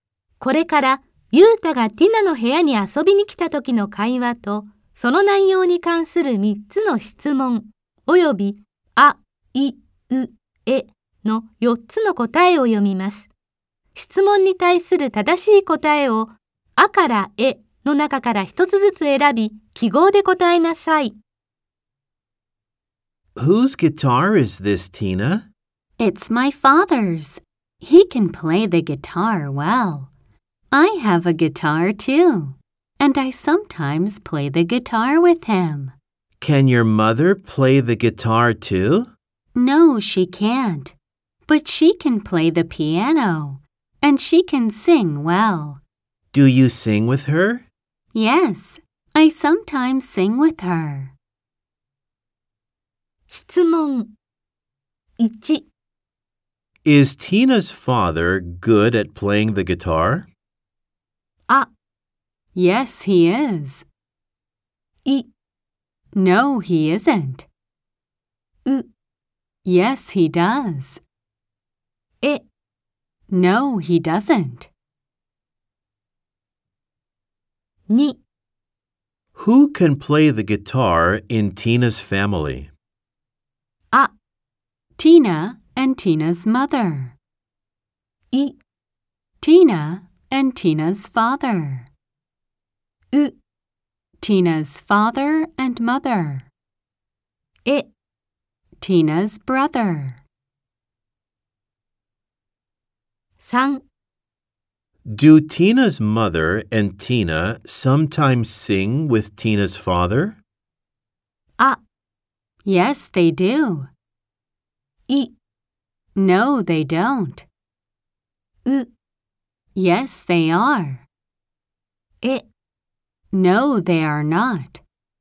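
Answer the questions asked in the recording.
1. あ: Yes, he is.
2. い: Tina and Tina's father.
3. い: No, they don't.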